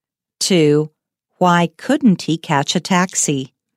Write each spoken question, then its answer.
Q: Why couldn't he catch a taxi?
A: He couldn't catch a taxi because he had run out of his pocket money.